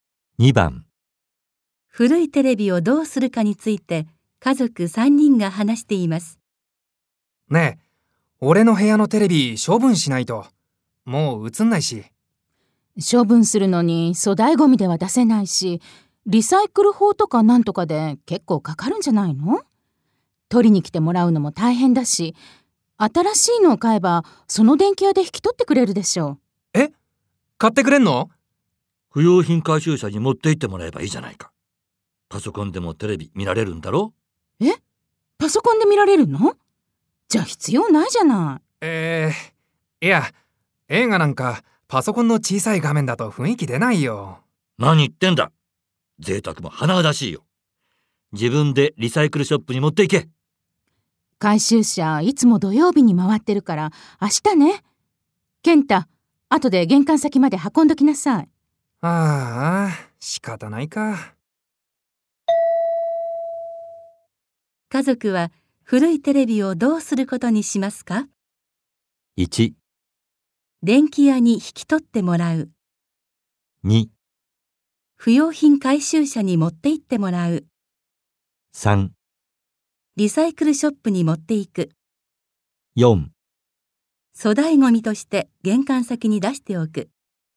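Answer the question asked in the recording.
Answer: 2: 不用品回収車に持って行ってもらう。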